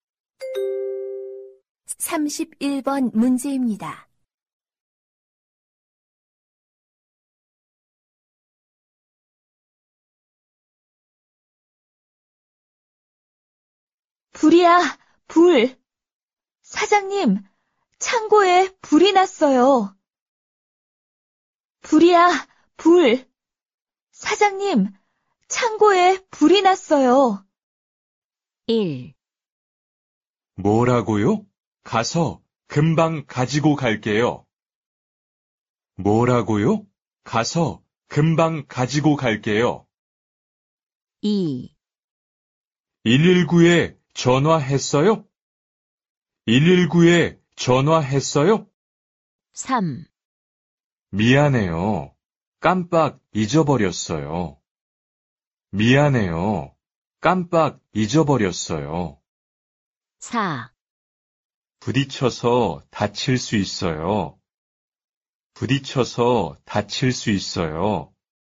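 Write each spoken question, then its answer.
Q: 불이야, 불. 사장님, 창고에 불이 났어요.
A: 2: 119에 전화했어요?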